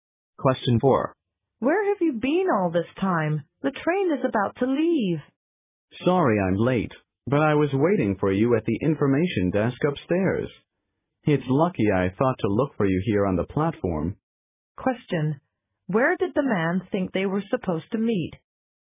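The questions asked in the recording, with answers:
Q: Where did the man think they were supposed to meet?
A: At the information desk upstairs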